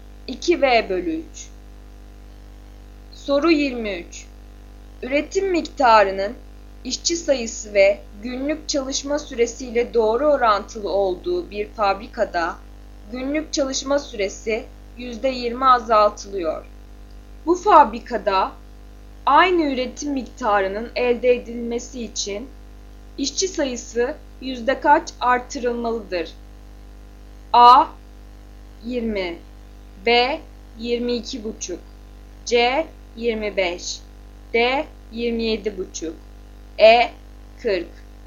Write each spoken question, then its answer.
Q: Bu fabrikada aynı üretim miktarının elde edilmesi için işçi sayısı yüzde kaç artırılmalıdır?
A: Doğru yanıt C 25.